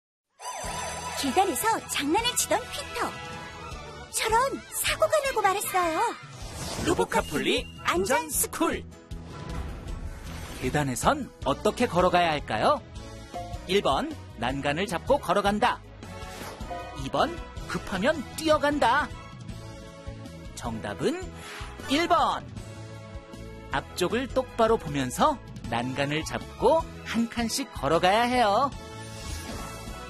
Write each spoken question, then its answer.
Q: 계단에선 어떻게 걸어가야 할까요?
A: 정답은 1번.